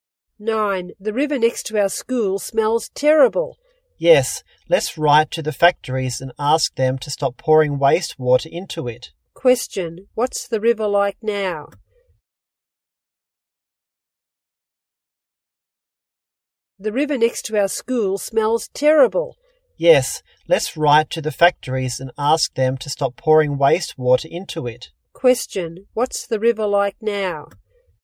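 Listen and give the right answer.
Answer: Polluted; it smells terrible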